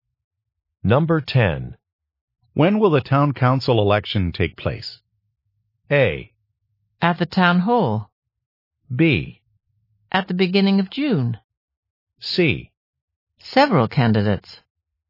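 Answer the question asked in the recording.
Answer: B: At the beginning of June.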